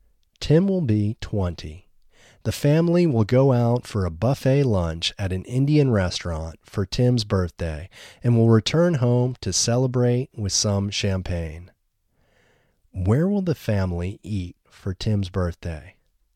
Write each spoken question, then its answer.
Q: Where will the family eat for Tim's birthday?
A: The family will go out for a buffet lunch at an Indian restaurant for Tim's birthday.